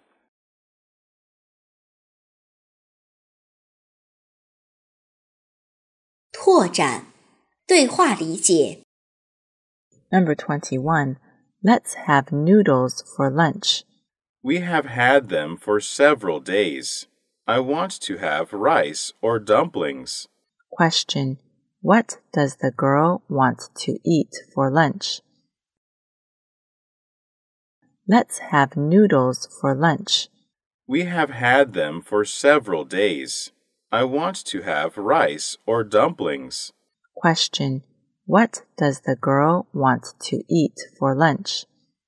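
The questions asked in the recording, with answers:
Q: Question. What does the girl want to eat for lunch?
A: Rice or dumplings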